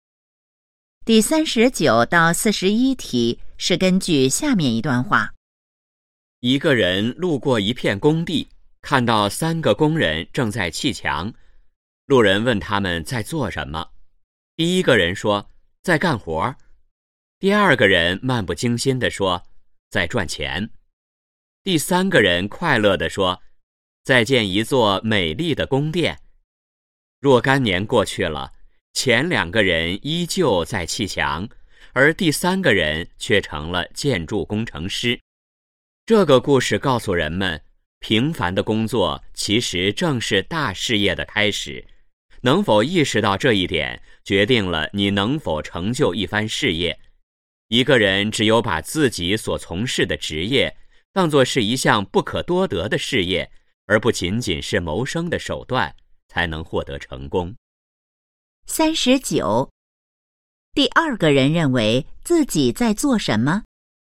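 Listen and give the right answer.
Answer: 在赚钱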